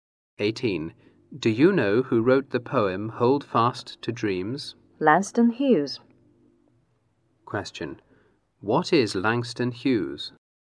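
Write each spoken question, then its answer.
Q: What is Langston Hughes?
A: A poet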